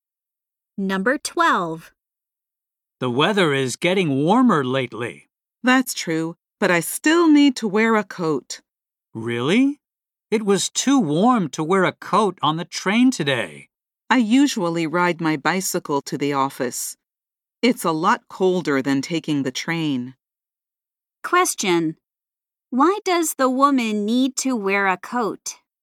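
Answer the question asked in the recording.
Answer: She rides her bicycle to the office, which is colder than taking the train.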